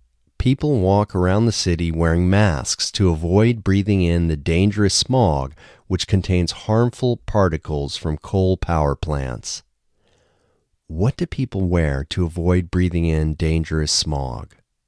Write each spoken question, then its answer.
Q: What do people wear to avoid breathing in dangerous smog?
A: People wear masks to avoid breathing in dangerous smog.